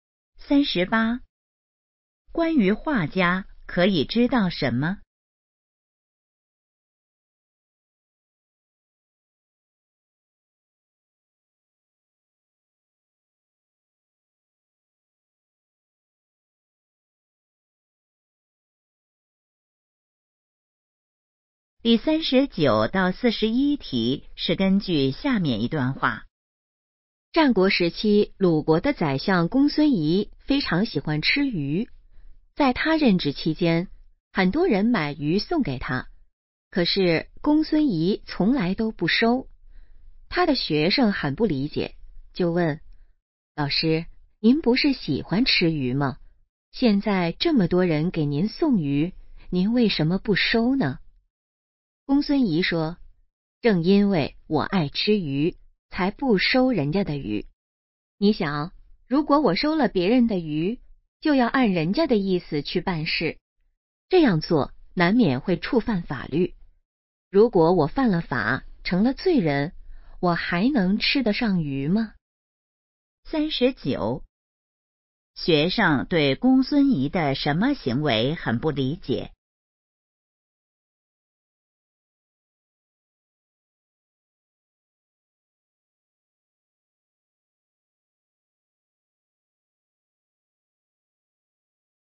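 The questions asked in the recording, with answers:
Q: 学生对公孙仪的什么行为很不理解?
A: 喜欢吃鱼却不收别人送的鱼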